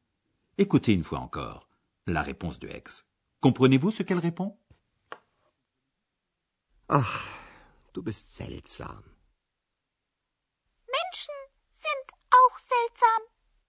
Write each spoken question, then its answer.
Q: Comprenez-vous ce qu'elle répond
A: x trouve que les êtres humains aussi, auch, sont bizarres.